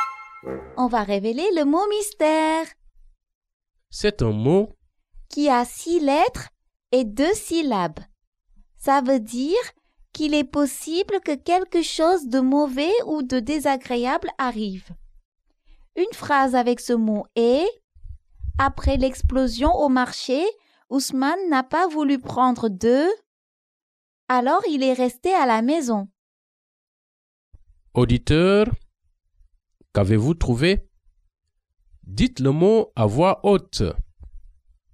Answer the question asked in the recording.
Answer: Le mot mystère est « risque ».